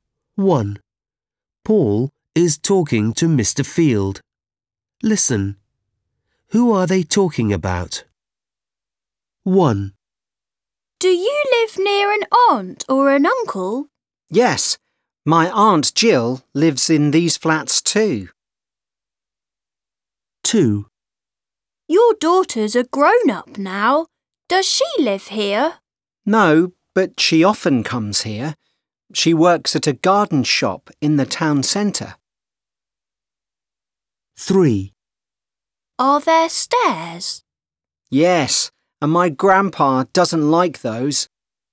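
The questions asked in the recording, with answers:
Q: Who are they talking about?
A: Mr. Field's daughter

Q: Who are they talking about?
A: Grandpa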